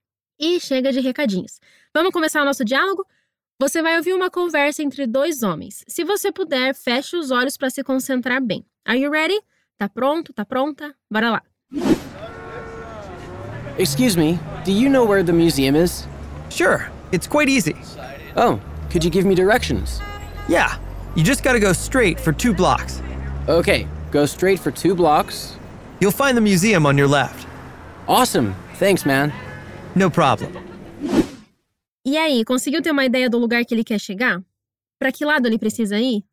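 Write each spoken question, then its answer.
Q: Para que lado ele precisa ir?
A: Seguir reto por duas quadras; o museu fica à esquerda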